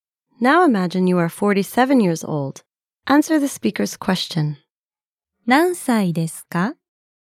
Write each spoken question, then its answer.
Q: 何歳ですか?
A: 47歳です。